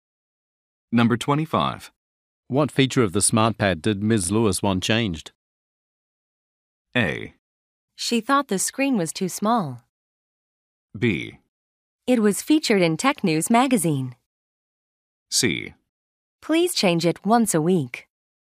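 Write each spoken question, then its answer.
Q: What feature of the smart pad did Ms. Lewis want changed?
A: A: She thought the screen was too small.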